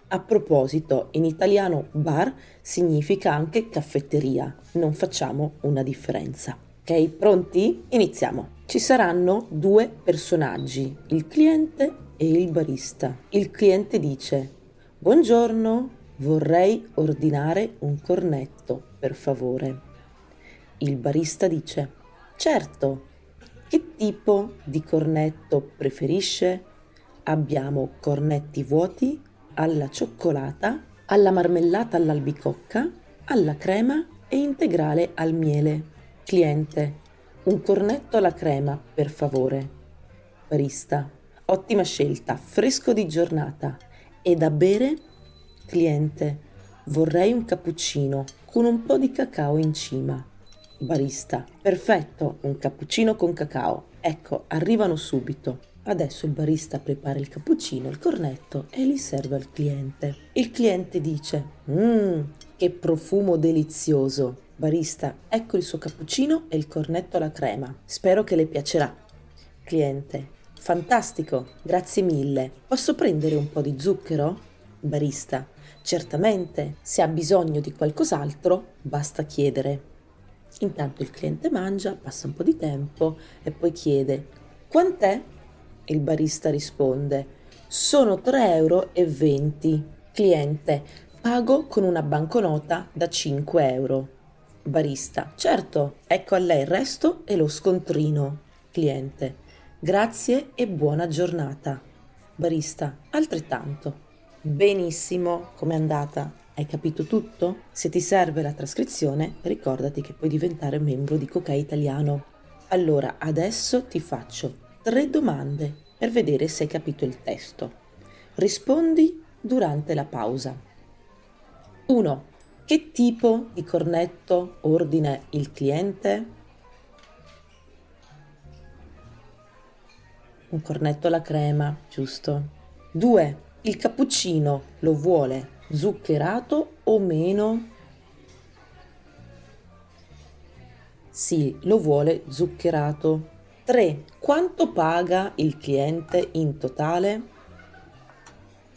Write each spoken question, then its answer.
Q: Che tipo di cornetto ordina il cliente?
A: un cornetto alla crema, giusto?

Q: Quanto paga il cliente in totale?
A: Paga 3,20 euro.